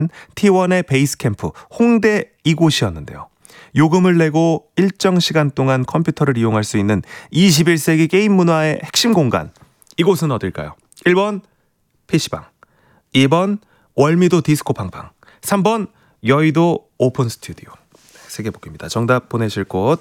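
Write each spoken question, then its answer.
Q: 이곳은 어딜까요?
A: 1: PC방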